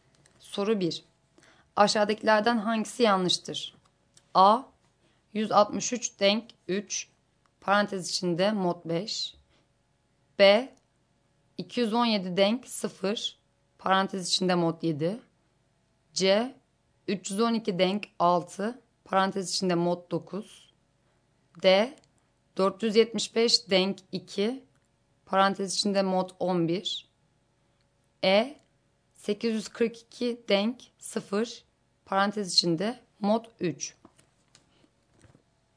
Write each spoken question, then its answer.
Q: Aşağıdakilerden hangisi yanlıştır?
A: Doğru yanıt E şıkkı.